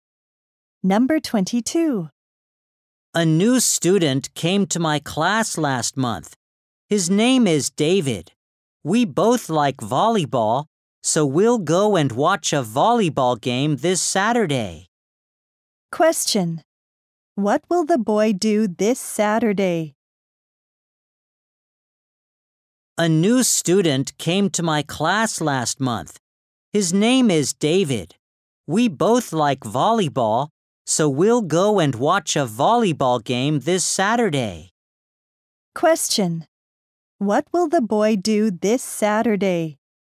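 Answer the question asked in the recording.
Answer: Watch a volleyball game with David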